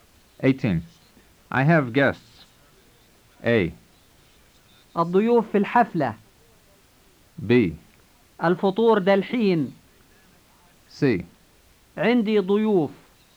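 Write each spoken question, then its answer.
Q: I have guests.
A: C: عندي ضيوف.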